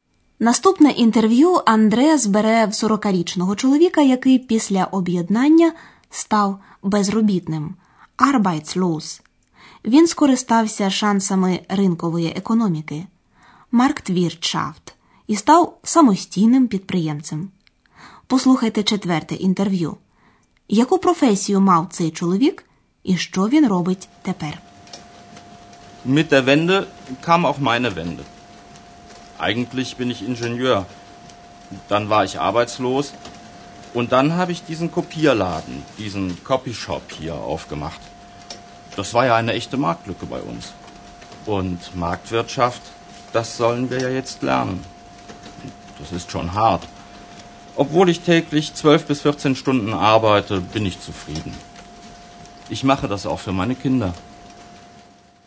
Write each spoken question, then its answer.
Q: яку професію мав цей чоловік і що він робить тепер.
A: За професією це чоловік інженер.